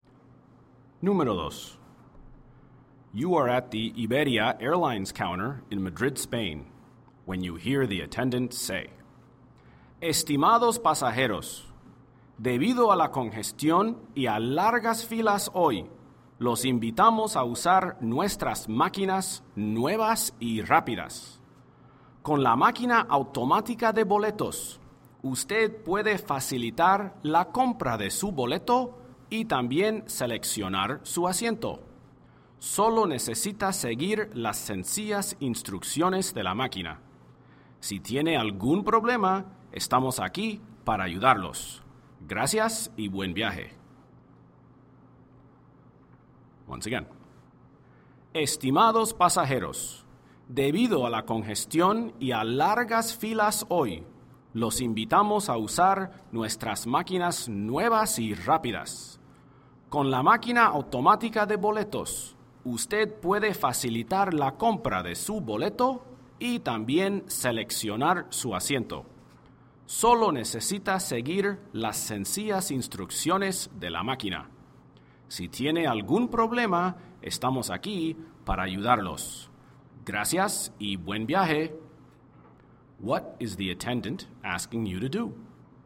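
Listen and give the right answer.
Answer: Use the new automatic ticket machines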